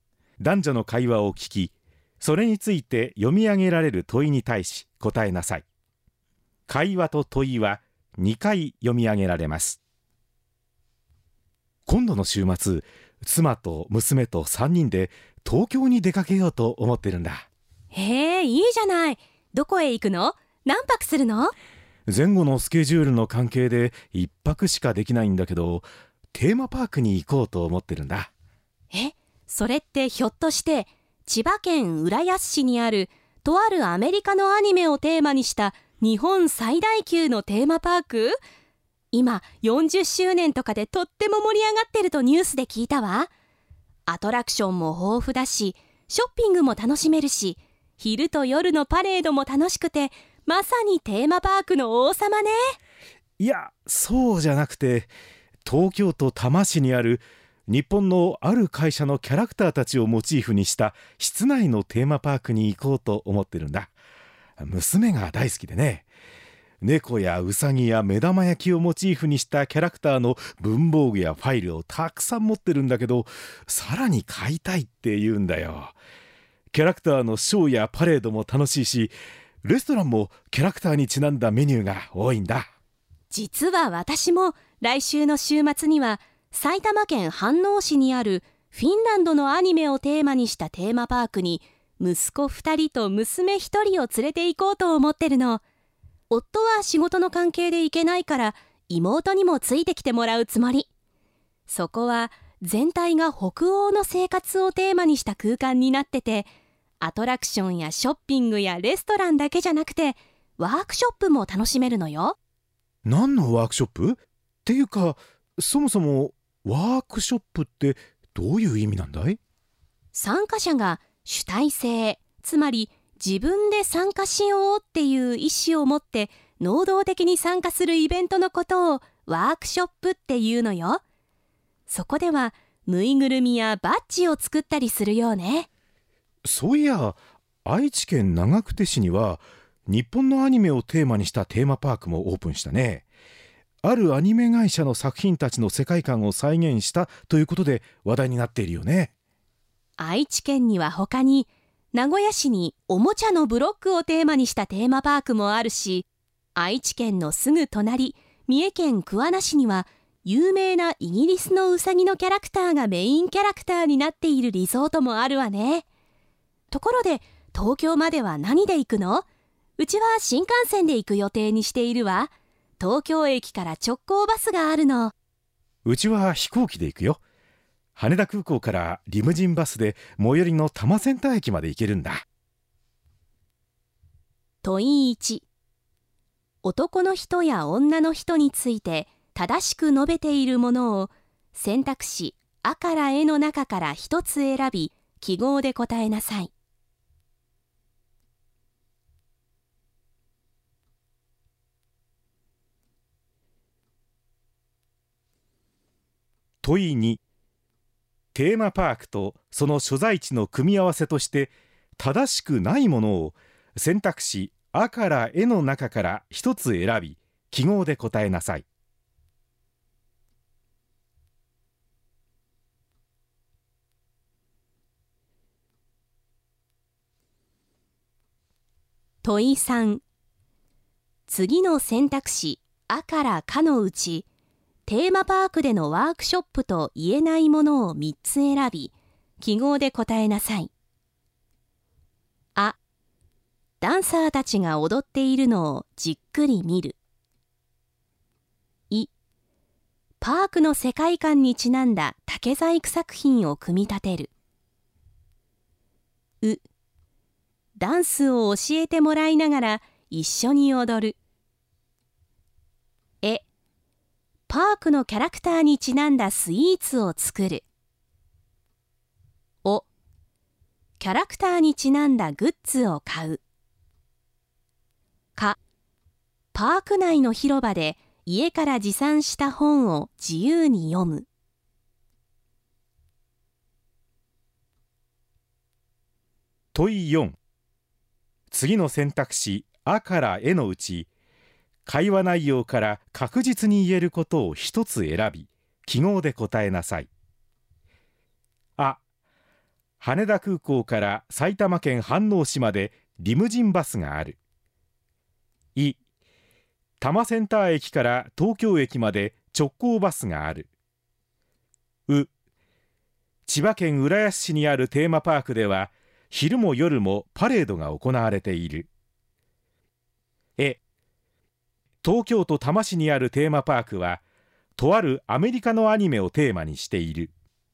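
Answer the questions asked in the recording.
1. あ: ダンサーたちが踊っているのをじっくり見る。お: キャラクターにちなんだグッズを買う。か: パーク内の広場で家から持参した本を自由に読む。
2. う: 千葉県浦安市にあるテーマパークでは、昼も夜もパレードが行われている。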